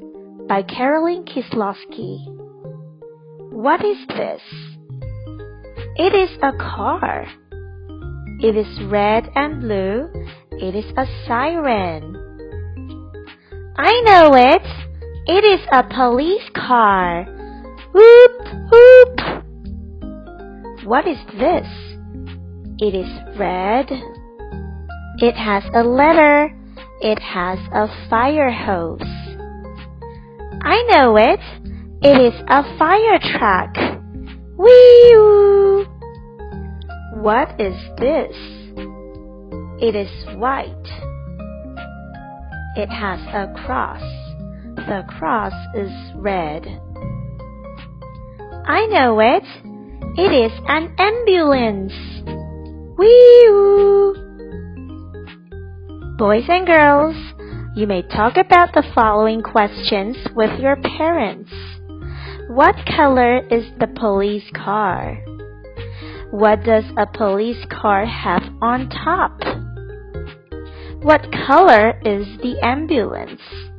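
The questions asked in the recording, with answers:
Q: What color is the police car?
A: Red and blue

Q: What does a police car have on top?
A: A siren

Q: What color is the ambulance?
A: White, with a red cross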